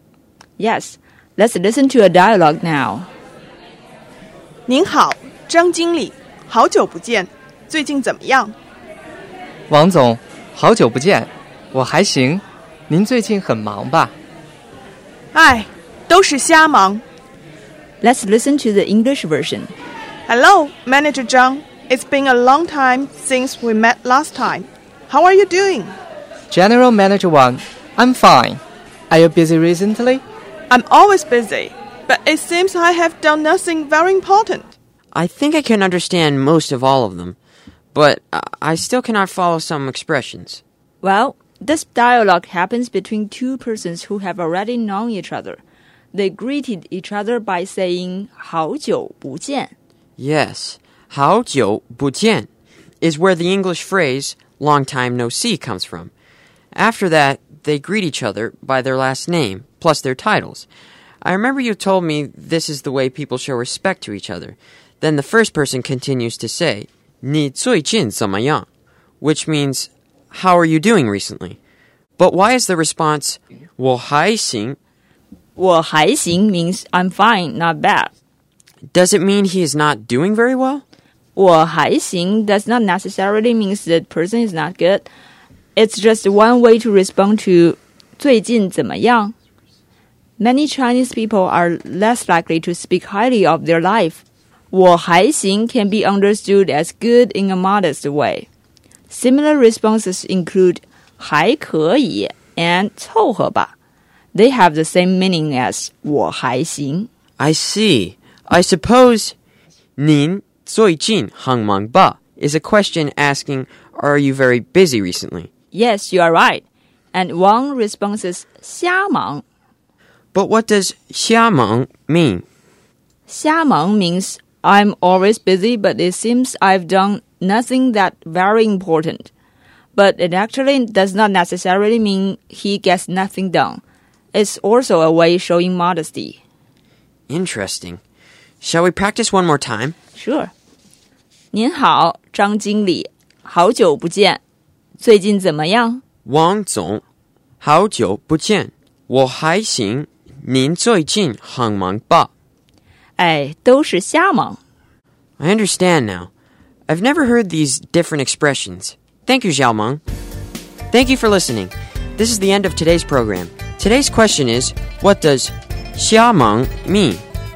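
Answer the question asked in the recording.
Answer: Always busy, but it seems nothing very important gets done (a modest way of saying you're busy)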